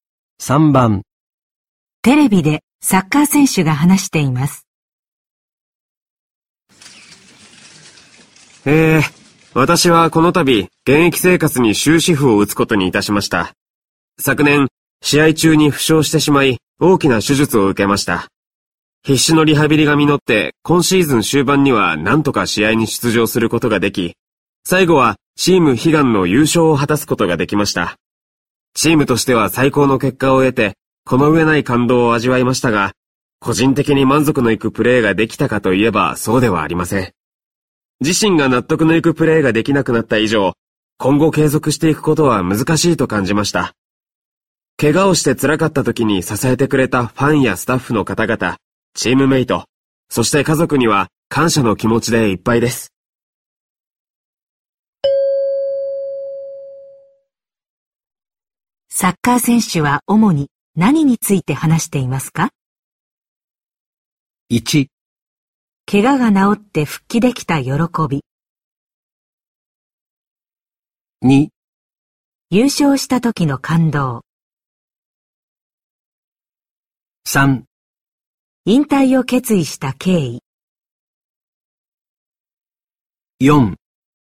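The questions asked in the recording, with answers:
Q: サッカー選手は主に何について話していますか?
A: 3: 引退を決意した経緯。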